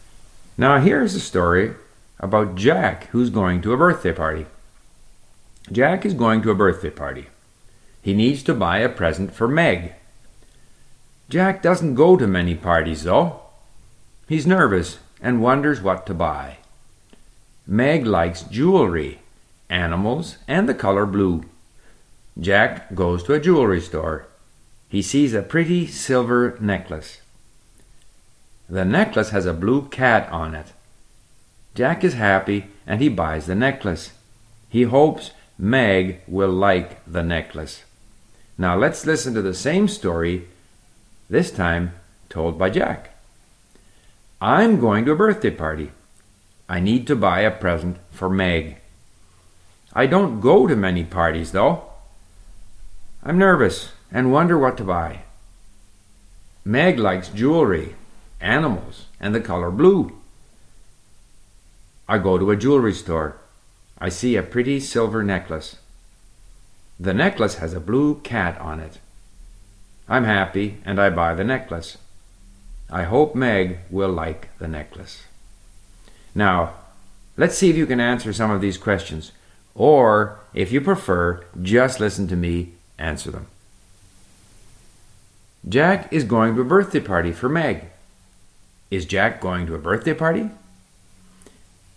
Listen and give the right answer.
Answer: Yes, Jack is going to a birthday party for Meg.